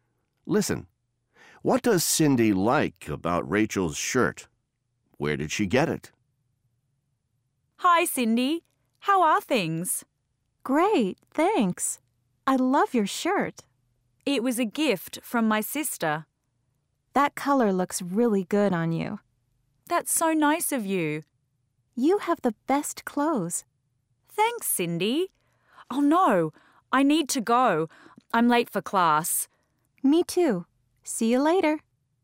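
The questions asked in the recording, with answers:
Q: What does Cindy like about Rachel's shirt?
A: The color looks really good on her

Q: Where did she get it?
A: It was a gift from her sister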